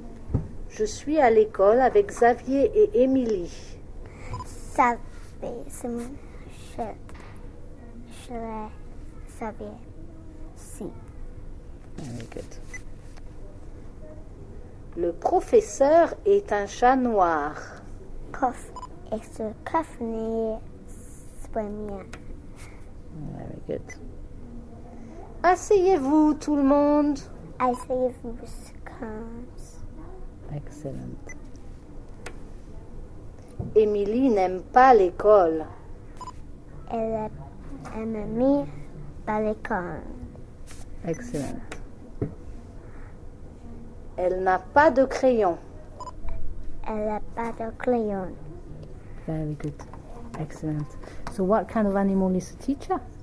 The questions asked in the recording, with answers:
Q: So what kind of animal is the teacher?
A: A cat.